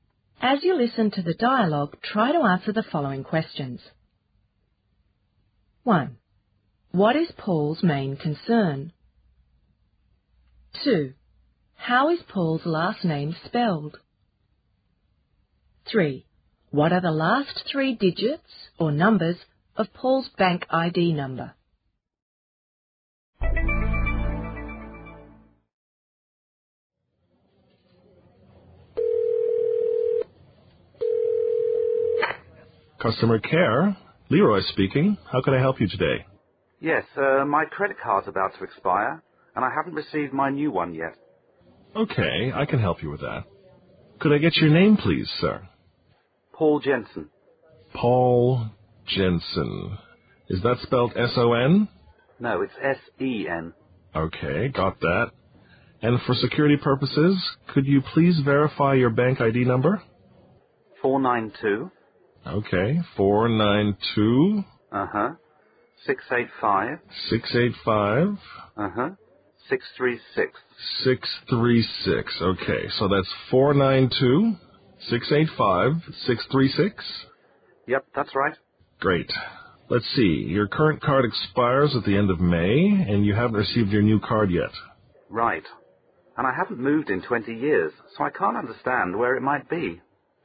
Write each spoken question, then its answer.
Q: What is Paul's main concern?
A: He's concerned because his replacement card hasn't arrived in the mail yet.

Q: How is Paul's last name spelled?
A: This is important, since Paul's name actually ends in S-E-N.